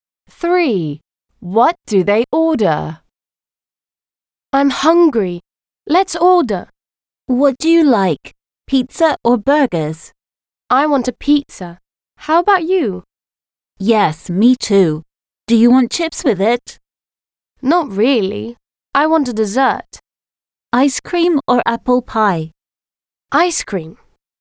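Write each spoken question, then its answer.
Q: What do they order?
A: pizza and ice cream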